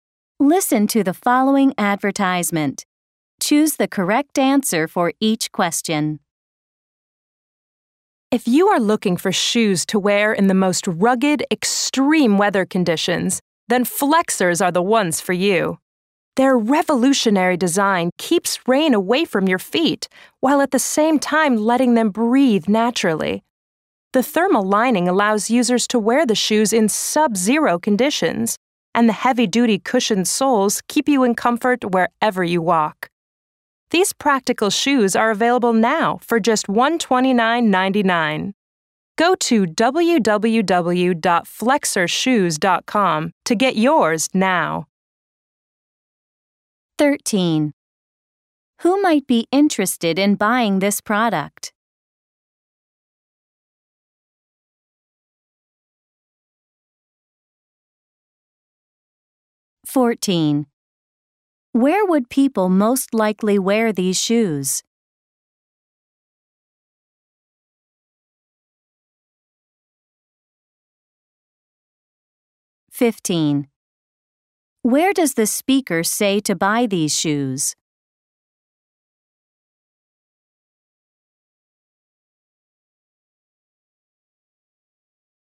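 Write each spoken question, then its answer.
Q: Where does the speaker say to buy these shoes?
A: Online at www.flexershoes.com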